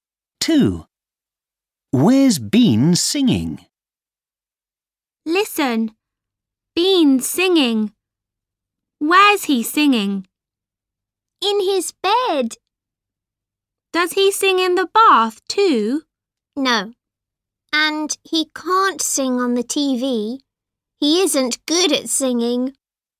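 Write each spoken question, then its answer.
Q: Where's Bean singing?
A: In his bed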